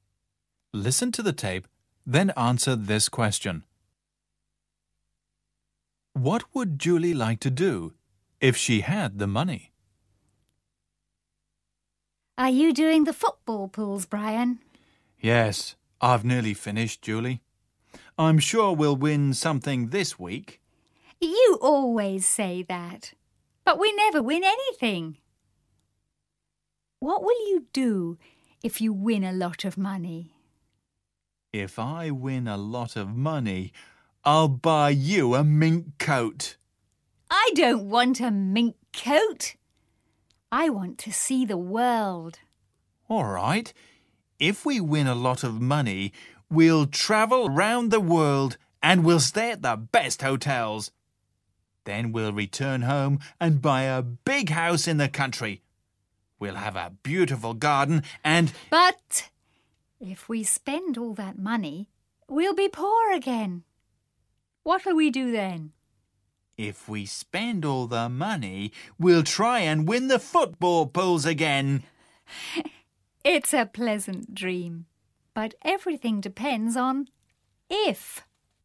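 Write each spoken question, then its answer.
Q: What would Julie like to do if she had the money?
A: See the world (travel around the world)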